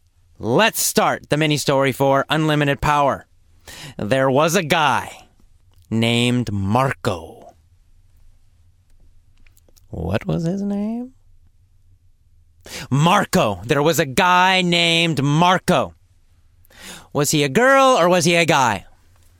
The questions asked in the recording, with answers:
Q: Was he a girl or was he a guy?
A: He was a guy, of course.